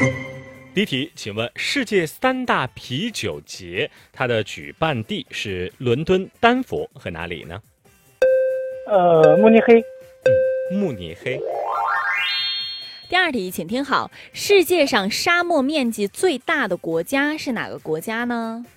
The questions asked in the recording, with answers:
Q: 请问世界三大啤酒节,它的举办地是伦敦、丹佛和哪里呢?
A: 慕尼黑。